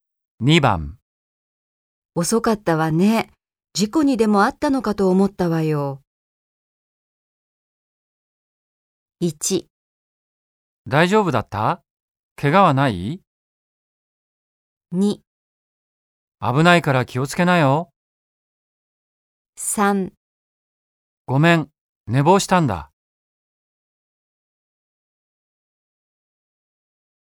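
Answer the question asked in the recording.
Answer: 3: ごめん、寝坊したんだ。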